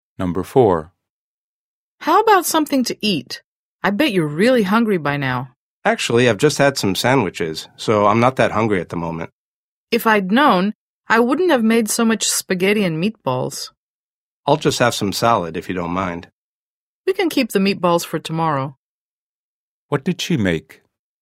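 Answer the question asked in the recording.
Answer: Spaghetti and meatballs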